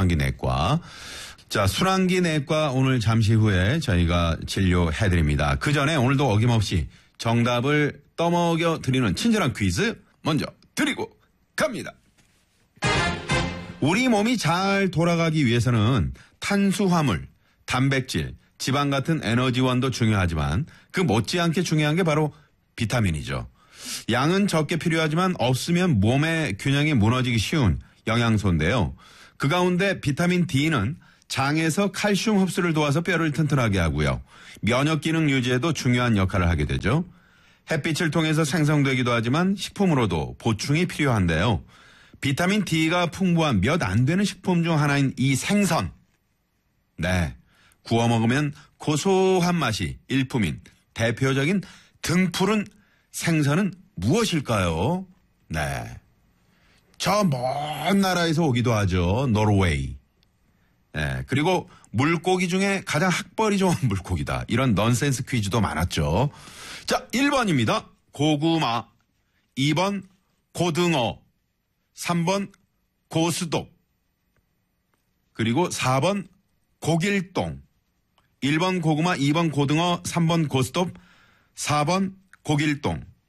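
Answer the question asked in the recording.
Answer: 2: 고등어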